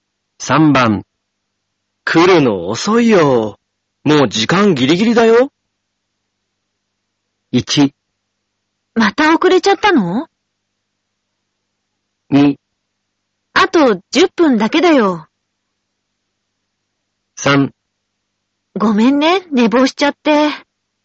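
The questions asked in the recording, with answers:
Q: 来るの遅いよ。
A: 3: ごめんね、寝坊しちゃって。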